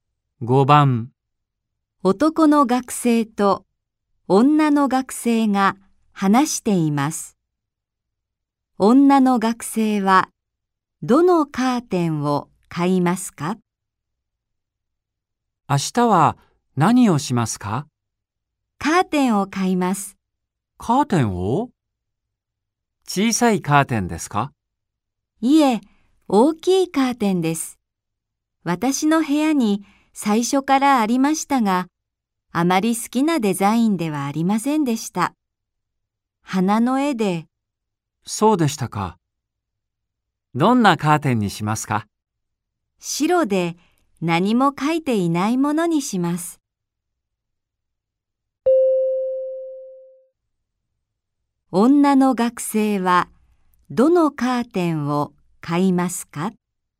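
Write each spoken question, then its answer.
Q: 女の学生はどのカーテンを買いますか?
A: 大きくて白い、何も描いていないカーテン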